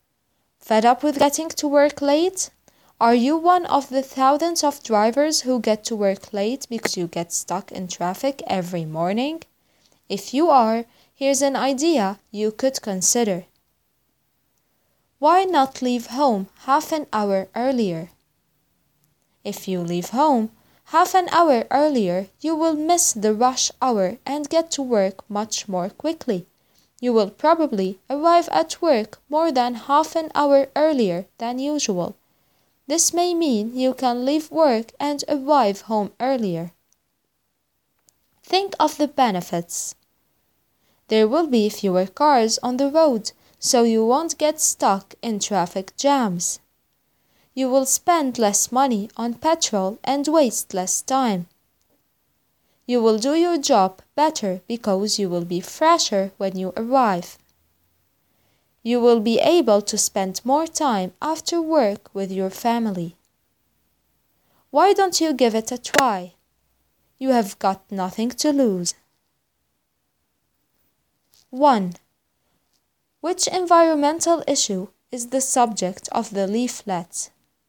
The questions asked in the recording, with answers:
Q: Which environmental issue is the subject of the leaflet?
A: The answer is traffic or congestion on the roads.